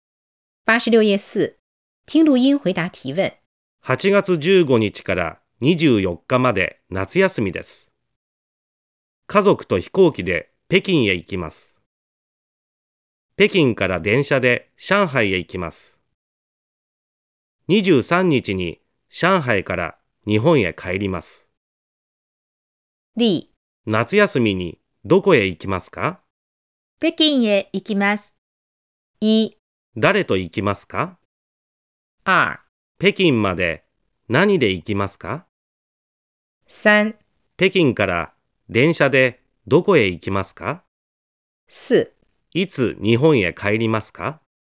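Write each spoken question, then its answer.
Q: 誰と行きますか?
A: 家族と行きます。

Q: 北京まで何で行きますか?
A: 飛行機で行きます。

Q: 北京から電車でどこへ行きますか?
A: 上海へ行きます。

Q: いつ日本へ帰りますか?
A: 23日に帰ります。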